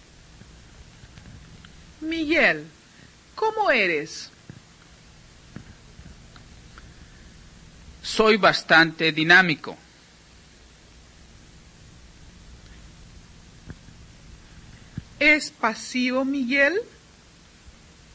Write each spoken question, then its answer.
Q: ¿Es pasivo, Miguel?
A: No, no es nada pasivo. Al contrario, Miguel es bastante dinámico.